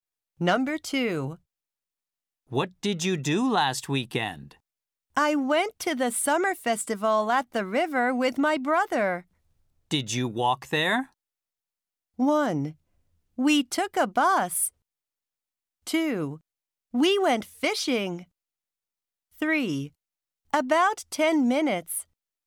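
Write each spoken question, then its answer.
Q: Did you walk there?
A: 1: We took a bus.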